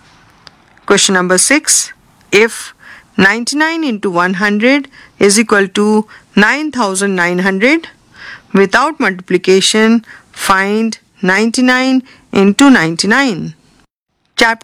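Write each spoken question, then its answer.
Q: If 99 into 100 is equal to 9900, without multiplication, find 99 into 99.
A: 9801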